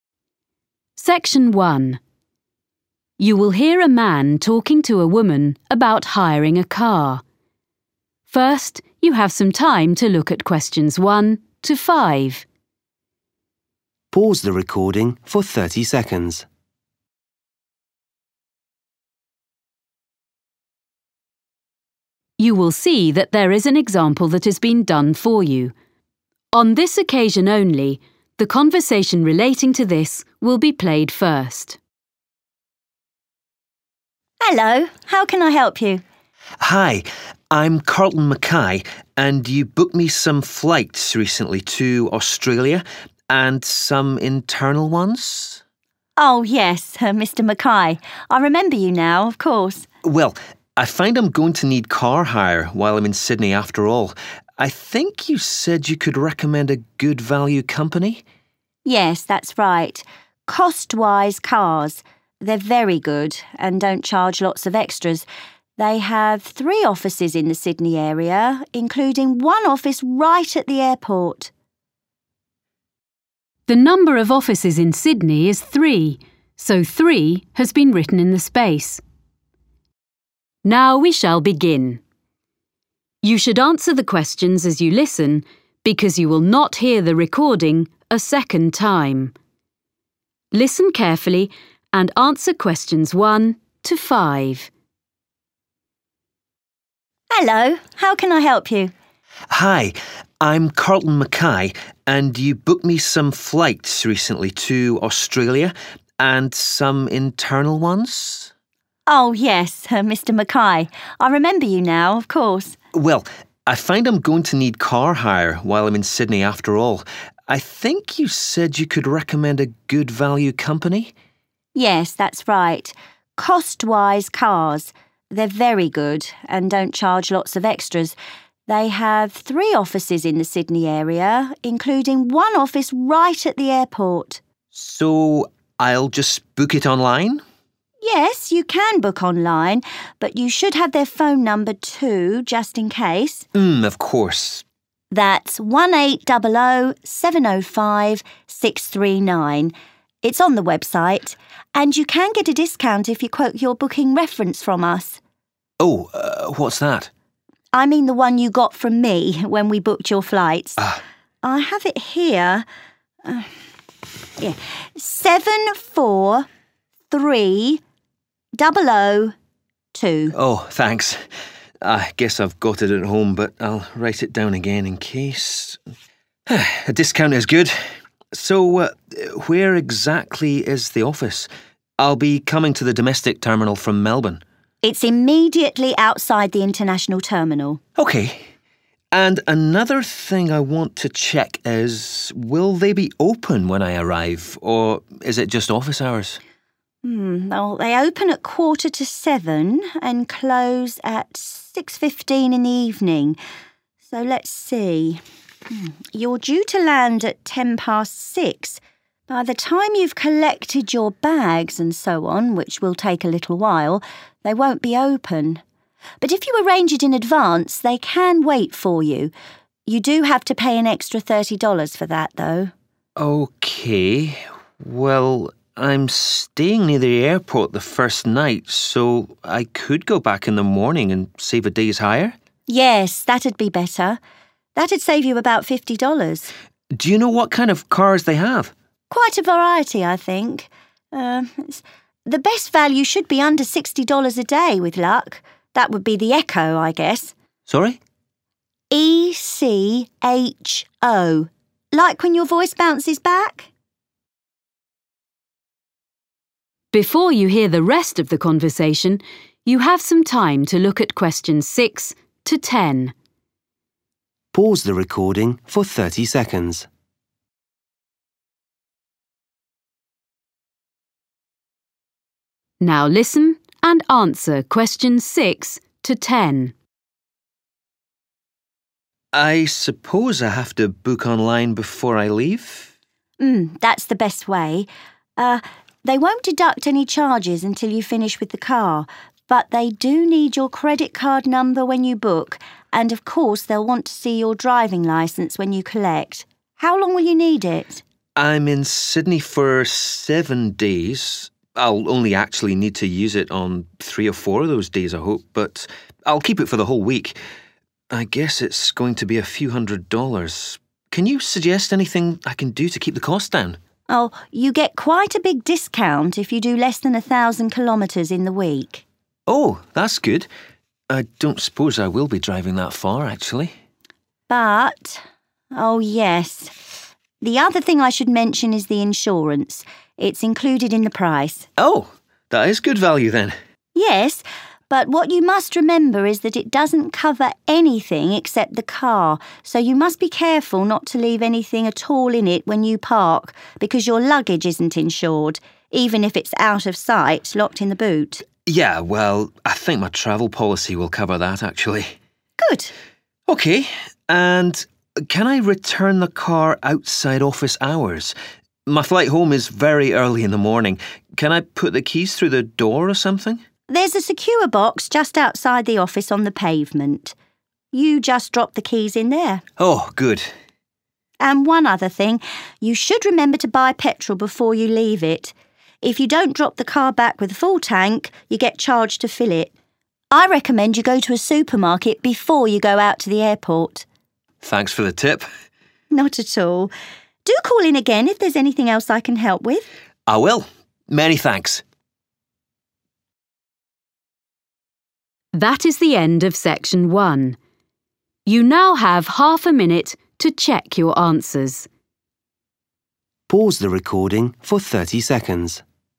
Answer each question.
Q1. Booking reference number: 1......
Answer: 743002

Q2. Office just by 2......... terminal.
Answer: international

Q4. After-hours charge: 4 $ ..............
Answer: thirty 1 30

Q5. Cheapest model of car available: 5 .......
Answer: Echo

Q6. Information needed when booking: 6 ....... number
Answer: credit card

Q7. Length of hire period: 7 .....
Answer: seven / 7 days / one / 1 week I a week

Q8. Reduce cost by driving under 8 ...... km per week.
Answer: 1,000 / a / one 1 1 thousand

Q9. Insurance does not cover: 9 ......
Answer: (his/the) luggage

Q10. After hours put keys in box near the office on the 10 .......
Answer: pavement

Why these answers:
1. 1800 705 639 is the car hire phone number.
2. He is arriving at the domestic terminal.
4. $50 is the amount saved; $60 is the daily hire cost.
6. He has to show his driving licence when he collects the car.
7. He says he'll only use the car on some of the days, but he'll keep it for the whole week.